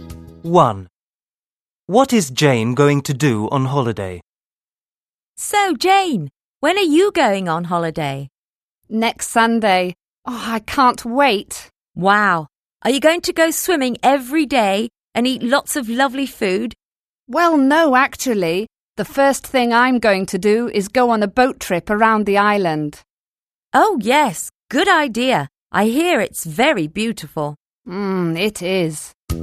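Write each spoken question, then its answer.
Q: What is Jane going to do on holiday?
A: Go on a boat trip around the island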